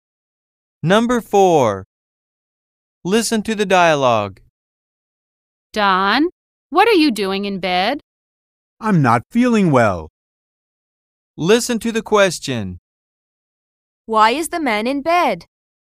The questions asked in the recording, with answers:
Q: Why is the man in bed?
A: Because he's feeling sick.